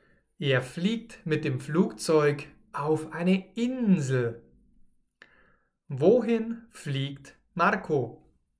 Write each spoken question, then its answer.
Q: Wohin fliegt Marco?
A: Auf eine Insel. Marco fliegt auf eine Insel.